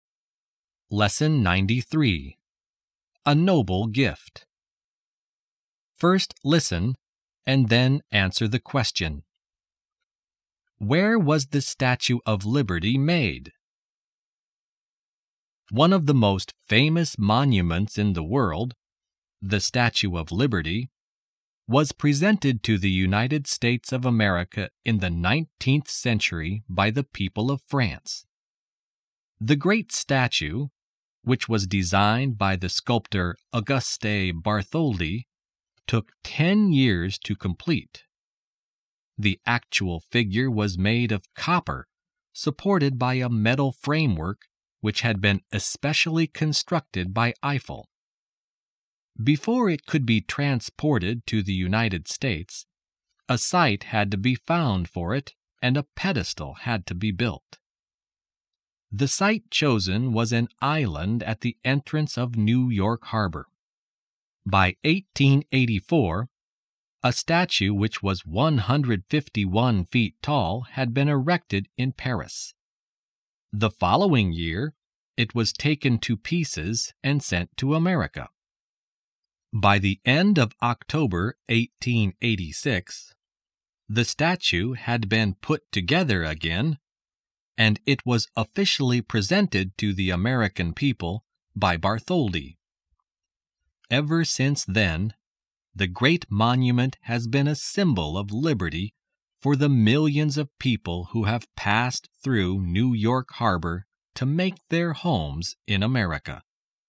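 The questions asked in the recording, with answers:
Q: Where was the Statue of Liberty made?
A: In Paris, France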